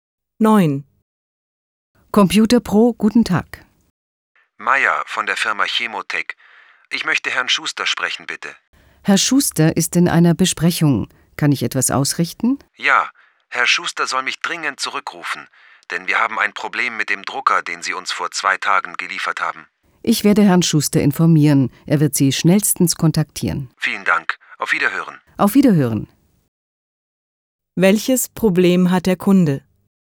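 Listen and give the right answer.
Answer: Ein Problem mit dem vor 2 Tagen gelieferten Drucker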